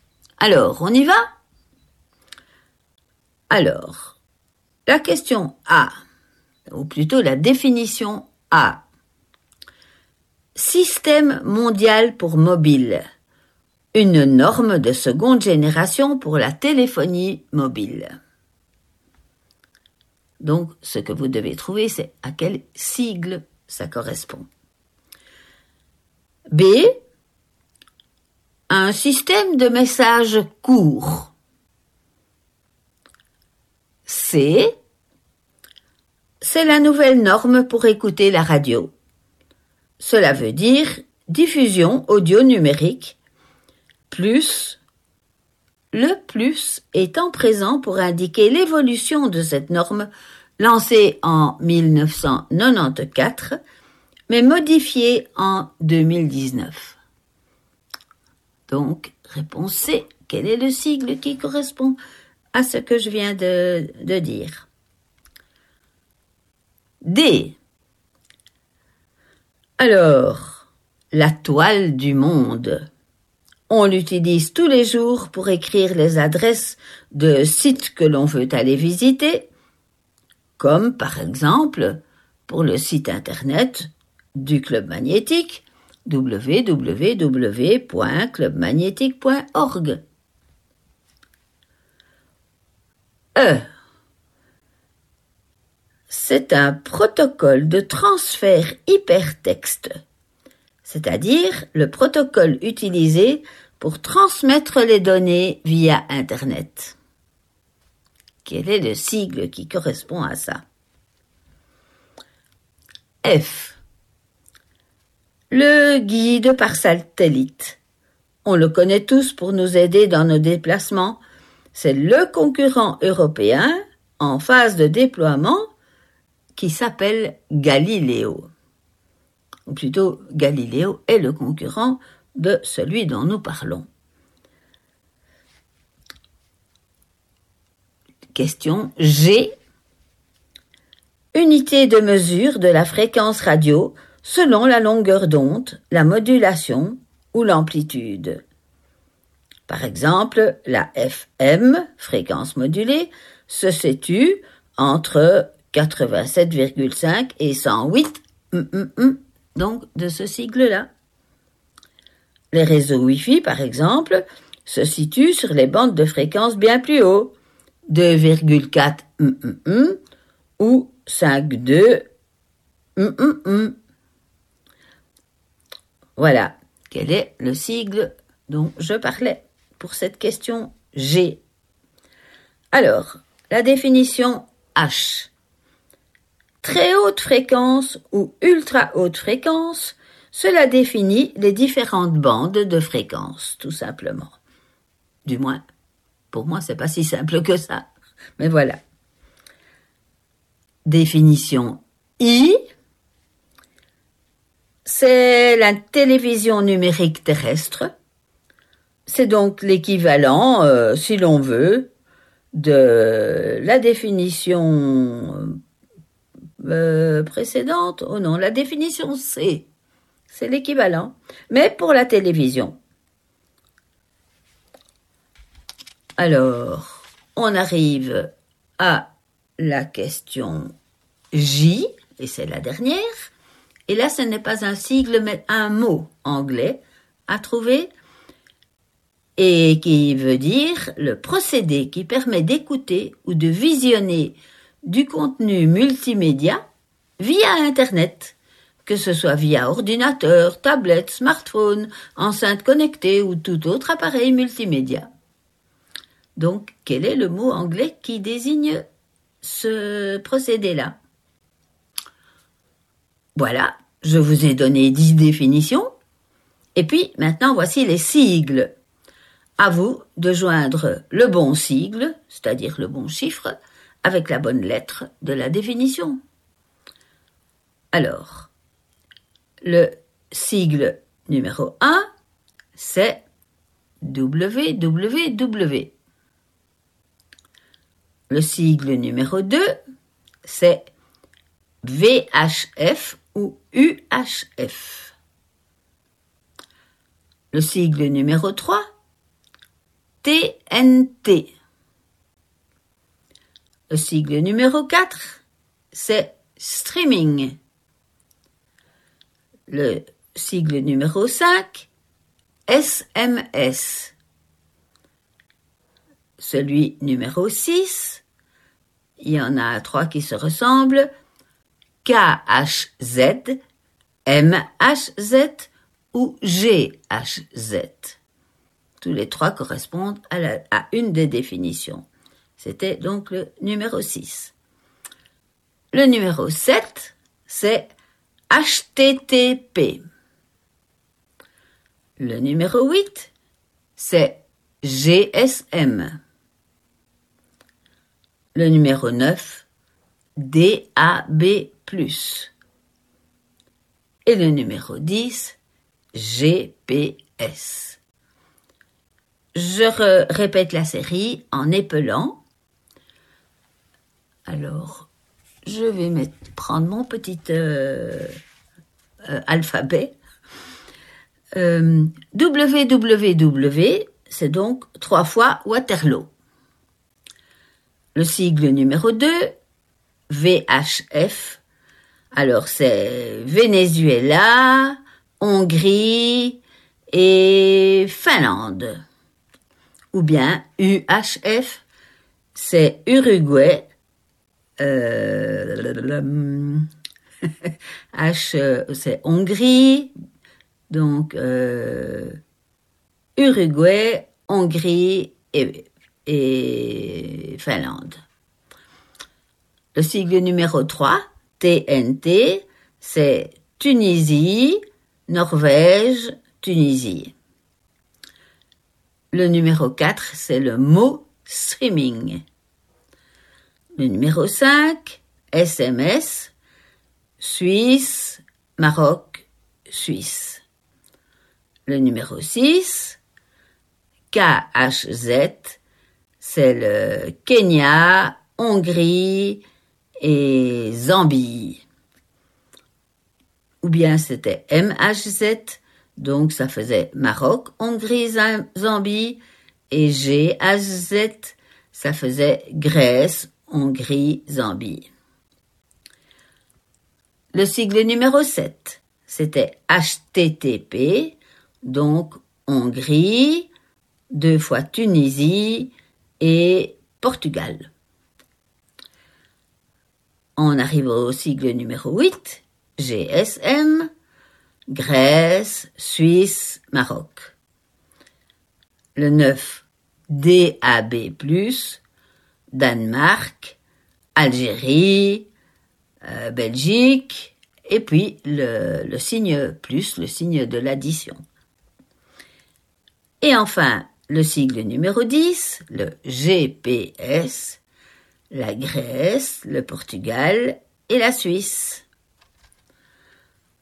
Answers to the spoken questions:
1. Eh bien, c'est le sigle 8, c'est-à-dire le GSM
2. c'est-à-dire SMS, tout simplement.
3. eh bien, c'est DAB+
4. eh bien c'était www.
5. Et ça fait HTTP.
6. C'était le sigle numéro 10.
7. Eh bien, ça, c'était le sigle 6
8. c'était le deuxième de la liste
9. Donc, ça c'était le troisième de la liste, TNT.
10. Et ça, c'est le streaming.